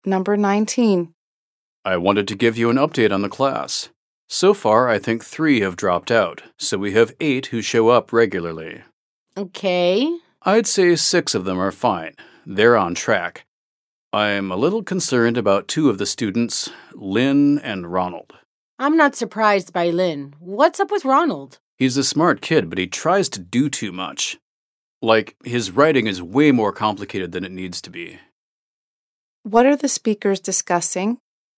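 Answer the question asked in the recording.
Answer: How the students in a class are doing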